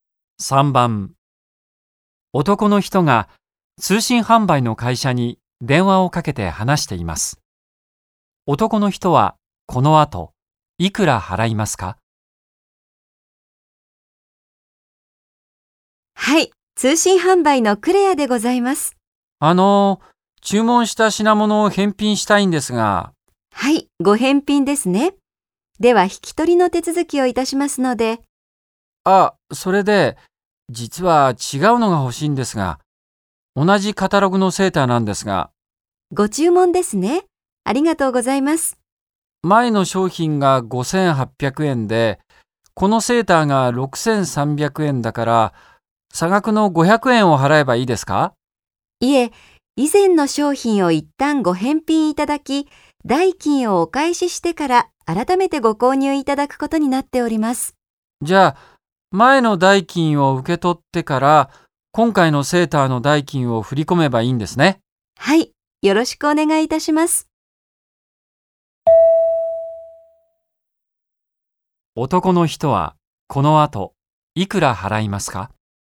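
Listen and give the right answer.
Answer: 6300円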